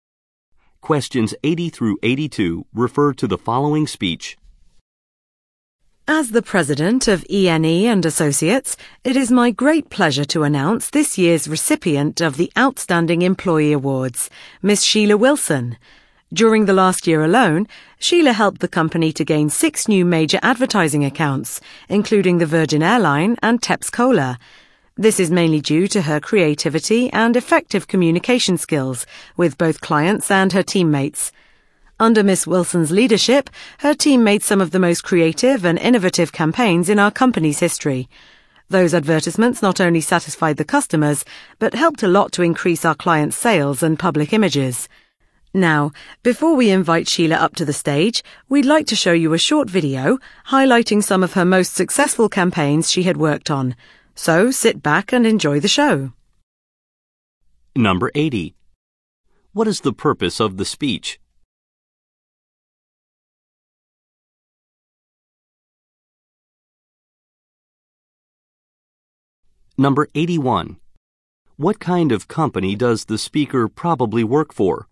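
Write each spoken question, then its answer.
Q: What is the purpose of the speech?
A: To announce an award recipient

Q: What kind of company does the speaker probably work for?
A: An advertising agency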